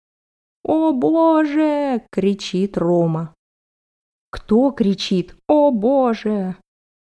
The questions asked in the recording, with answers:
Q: Кто кричит «О боже!»?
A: Рома кричит «О боже!».